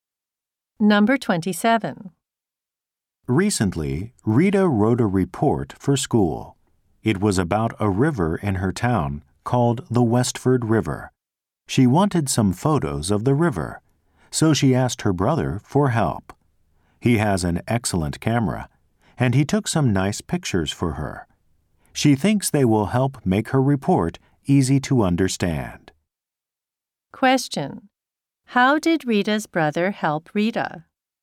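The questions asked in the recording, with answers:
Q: How did Rita's brother help Rita?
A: He took photos of the river for her report.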